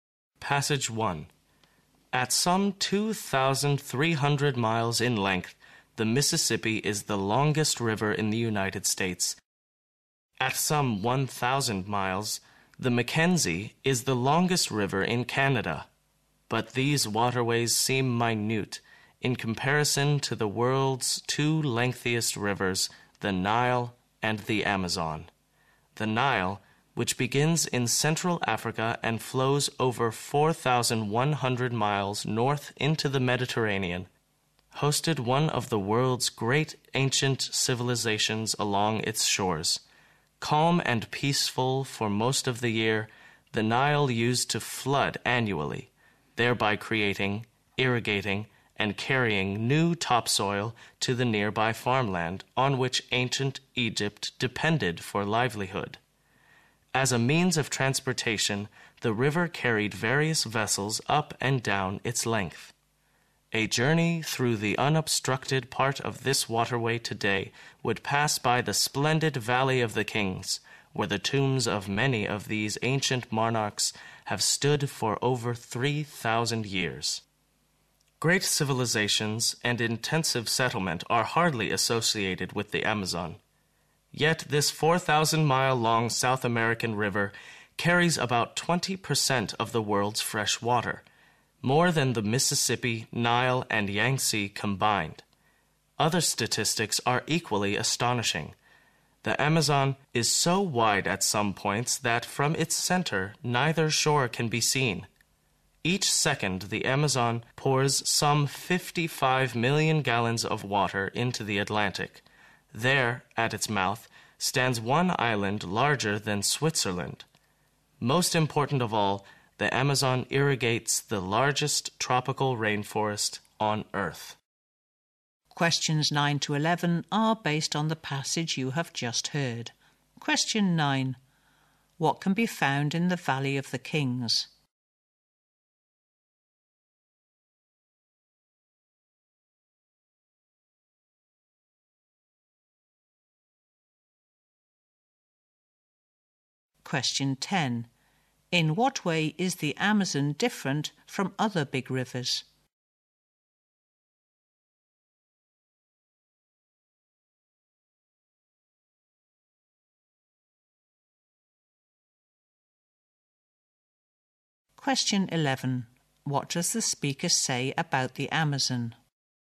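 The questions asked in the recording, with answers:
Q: What can be found in the Valley of the Kings?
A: Tombs of ancient monarchs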